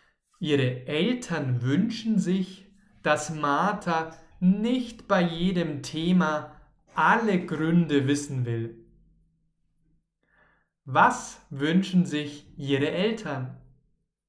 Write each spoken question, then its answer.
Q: Was wünschen sich ihre Eltern?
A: Dass Martha nicht bei jedem Thema alle Gründe wissen will, das wünschen sie sich.